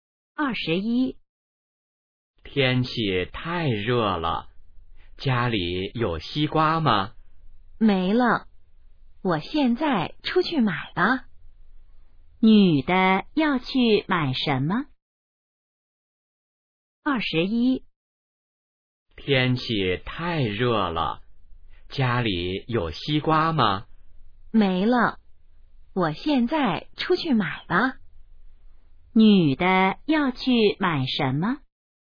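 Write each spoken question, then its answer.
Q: 女的要去买什么?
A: 西瓜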